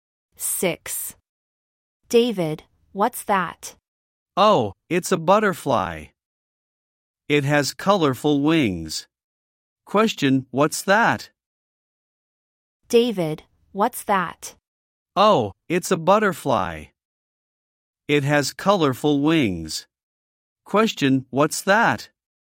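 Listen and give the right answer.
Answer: A butterfly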